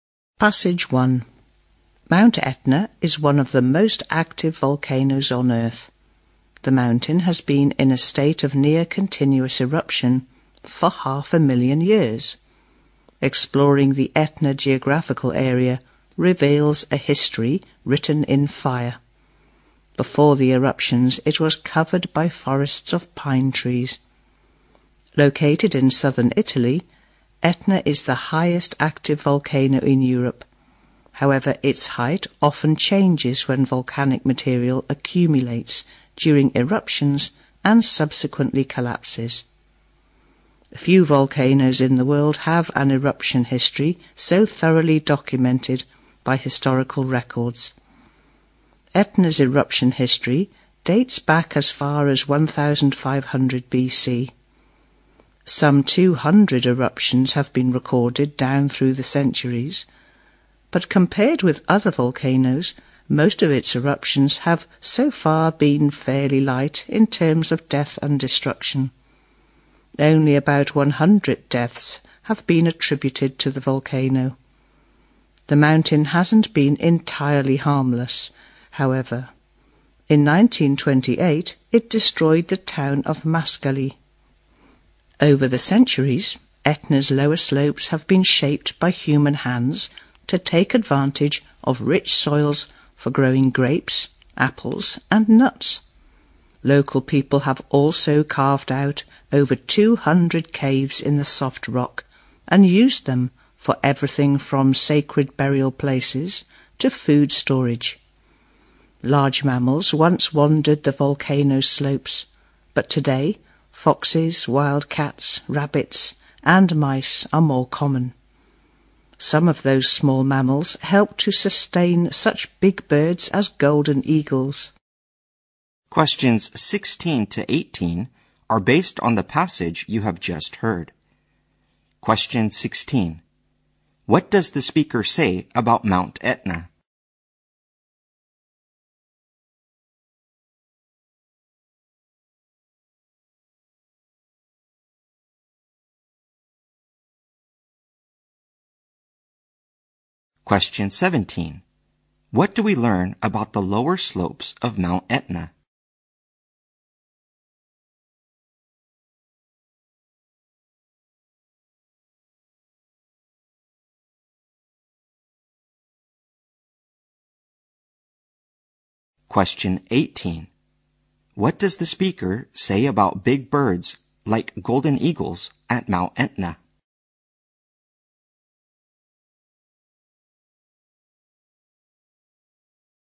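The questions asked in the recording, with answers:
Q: What do we learn about the lower slopes of Mount Etna?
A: They have been shaped by people to use the rich soils for growing grapes, apples and nuts

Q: What does the speaker say about big birds like golden eagles at Mount Etna?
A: They are sustained by small mammals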